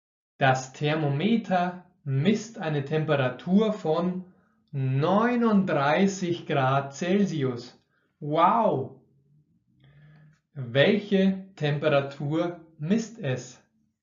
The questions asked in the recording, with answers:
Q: Welche Temperatur misst es?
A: 39 Grad Celsius. Es misst